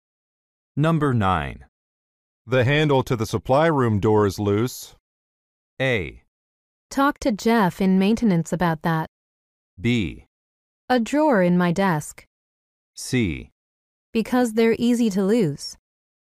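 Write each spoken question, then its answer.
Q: The handle to the supply room door is loose.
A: A: Talk to Jeff in maintenance about that.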